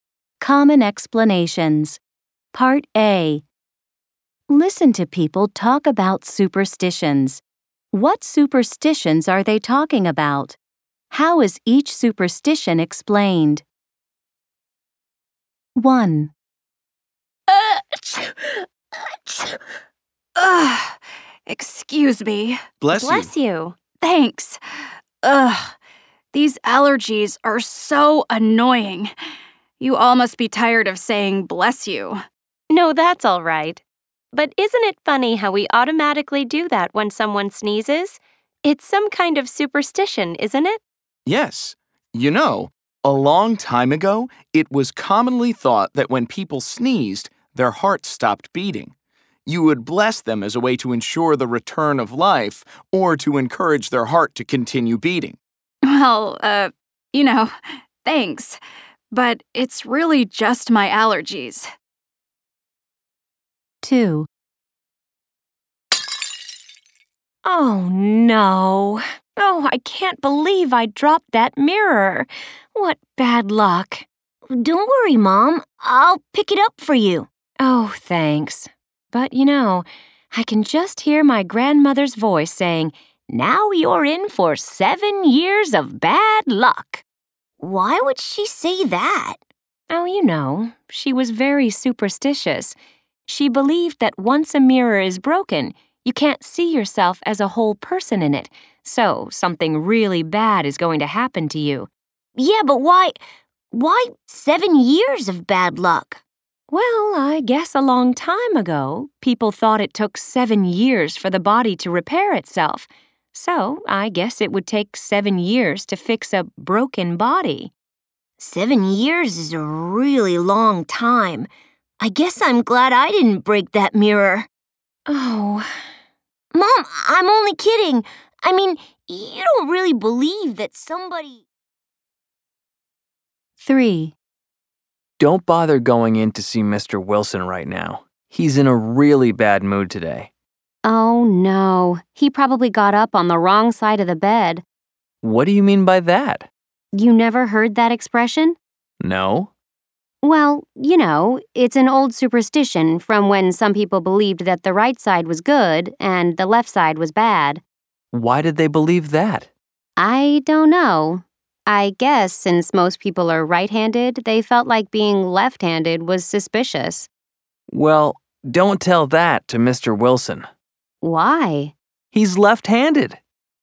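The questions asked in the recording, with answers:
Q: What superstitions are they talking about?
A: Saying 'bless you' when someone sneezes; breaking a mirror brings 7 years of bad luck; getting up on the wrong side of the bed

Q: How is each superstition explained?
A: People thought the heart stopped when sneezing; the body was thought to take 7 years to repair itself; the right side was considered good and the left side bad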